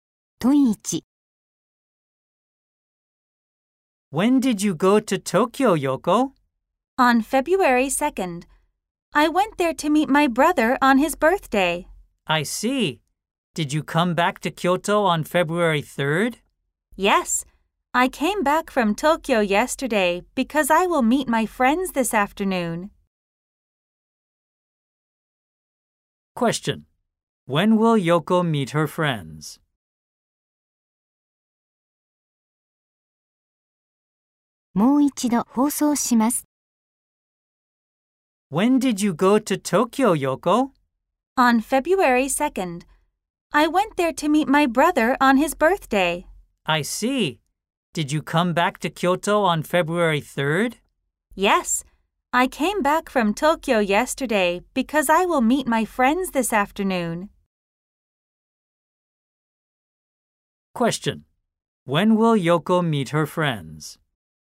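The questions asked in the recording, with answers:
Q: When will Yoko meet her friends?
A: This afternoon, on February 4th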